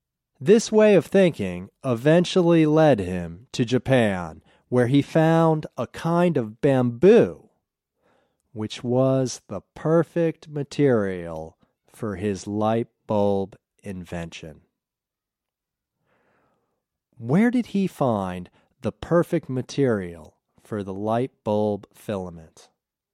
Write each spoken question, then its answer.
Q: Where did he find the perfect material for the light bulb filament?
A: He found the perfect material for the light bulb filament in Japan.